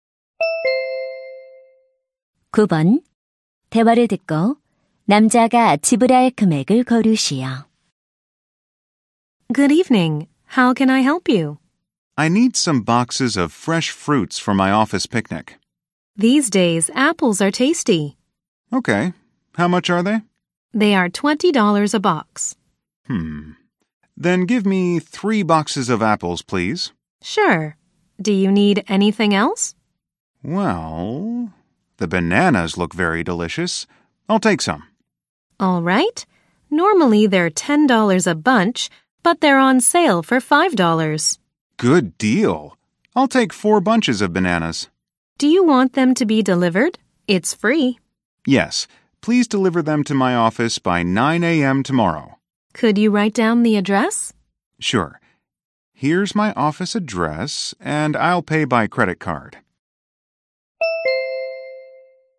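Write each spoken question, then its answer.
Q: 대화를 듣고 남자가 지불할 금액을 고르시오.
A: $80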